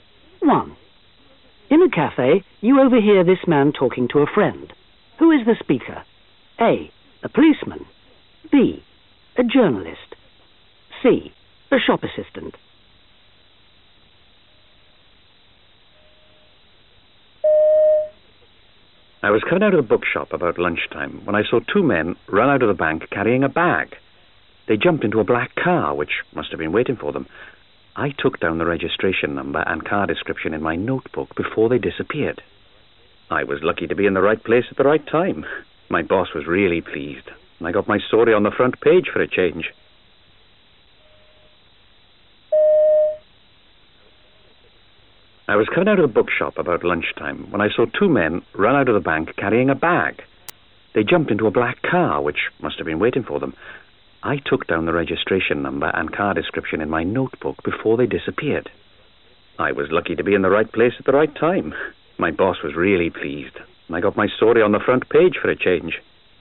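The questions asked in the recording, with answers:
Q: Who is the speaker? A. A policeman. B. A journalist. C. A shop assistant.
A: B: A journalist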